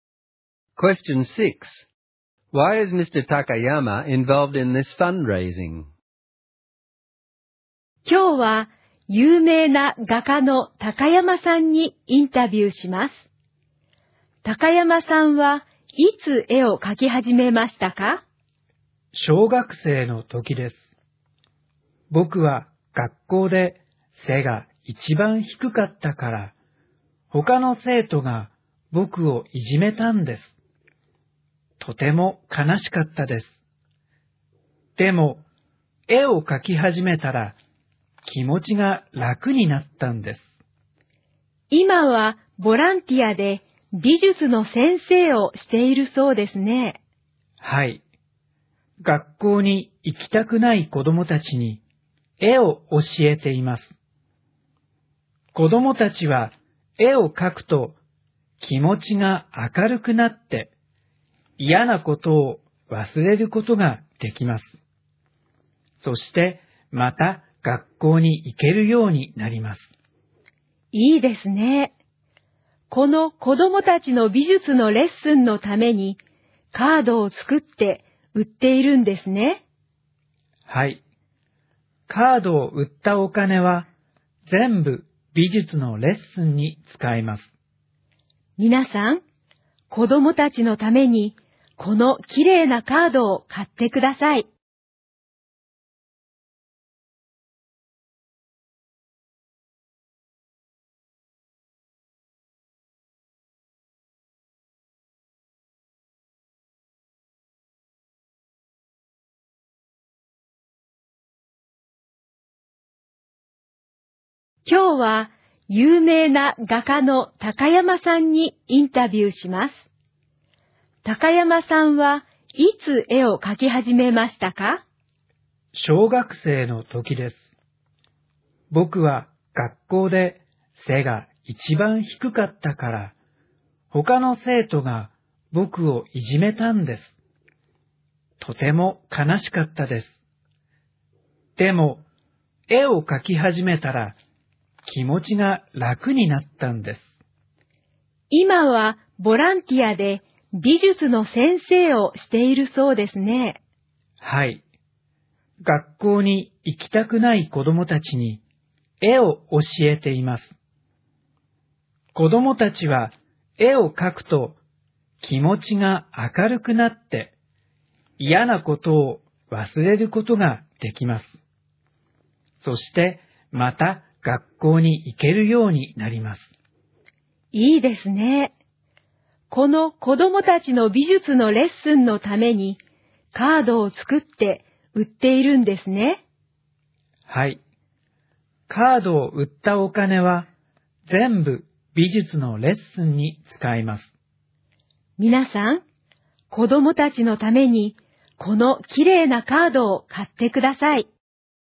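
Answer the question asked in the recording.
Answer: He was bullied as a child and drawing made him feel better; now he teaches art as a volunteer to children who don't want to go to school, and sells cards to pay for their art lessons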